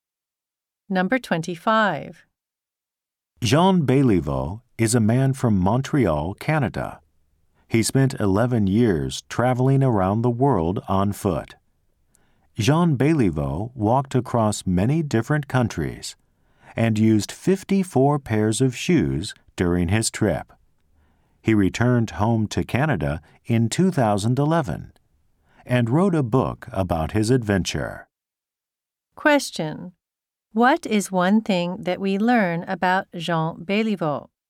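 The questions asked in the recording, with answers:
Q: What is one thing that we learn about Jean Béliveau?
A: He spent 11 years walking around the world.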